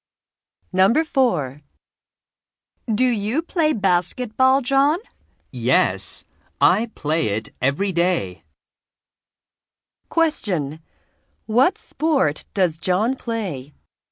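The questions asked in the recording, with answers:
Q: What sport does John play?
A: Basketball.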